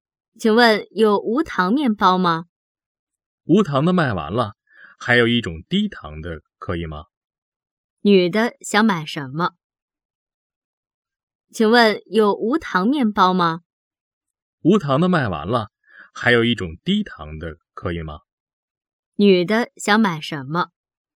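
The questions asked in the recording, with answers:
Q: 女的想买什么?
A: 无糖面包

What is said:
女:请问,有无糖面包吗?
男:无糖的卖完了,还有一种低糖的可以吗?
问:女的想买什么?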